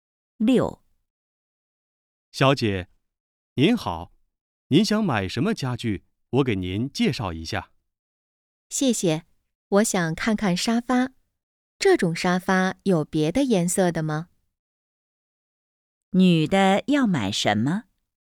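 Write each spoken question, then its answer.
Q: 女的要买什么?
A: 沙发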